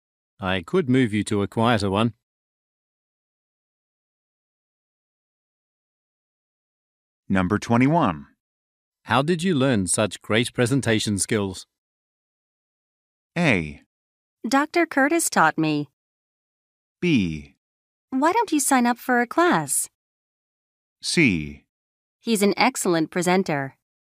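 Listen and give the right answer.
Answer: A: Dr. Curtis taught me.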